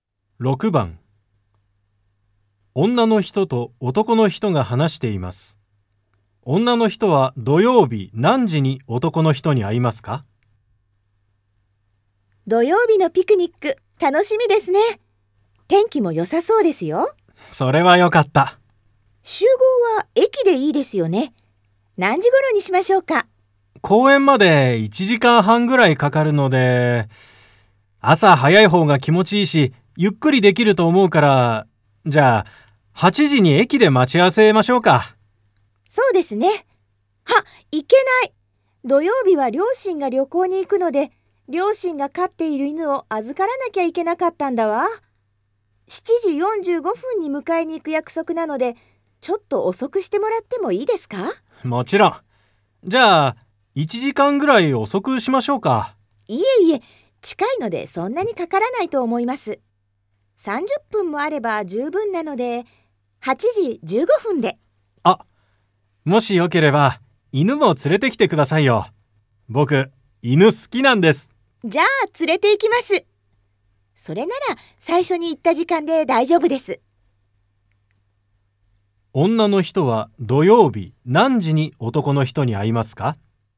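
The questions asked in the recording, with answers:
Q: 女の人は土曜日何時に男の人に会いますか?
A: 8時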